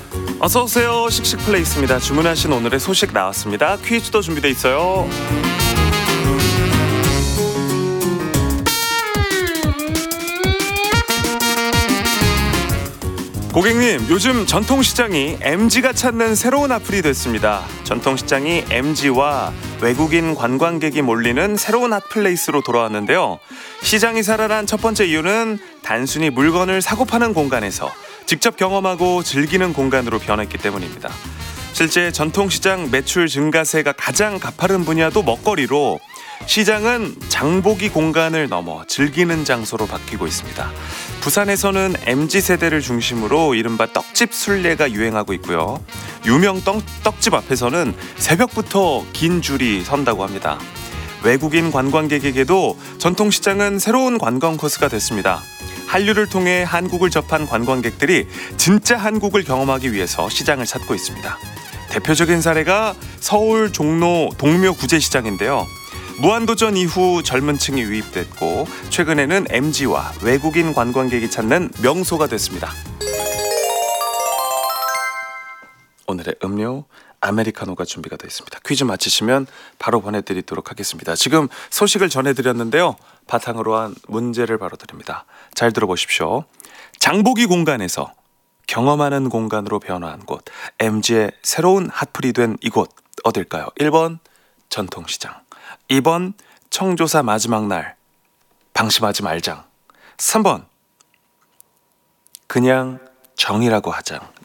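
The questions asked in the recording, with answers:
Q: 장보기 공간에서 경험하는 공간으로 변화한 곳, MG의 새로운 핫플이 된 이곳 어딜까요?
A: 1번: 전통시장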